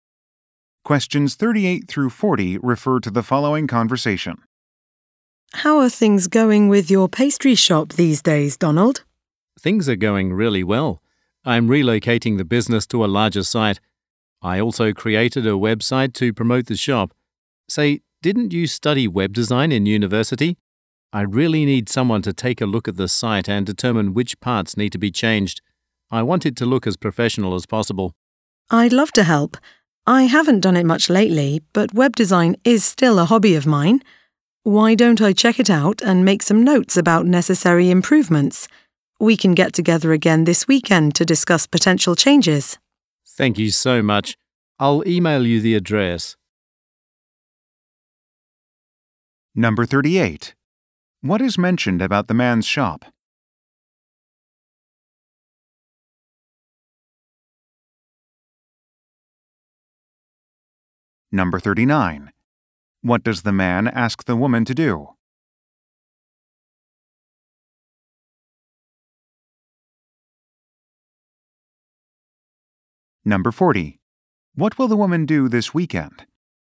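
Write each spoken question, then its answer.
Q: What is mentioned about the man's shop?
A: It is relocating to a larger site

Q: What does the man ask the woman to do?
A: Review his website and suggest changes

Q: What will the woman do this weekend?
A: Meet him to discuss changes to the website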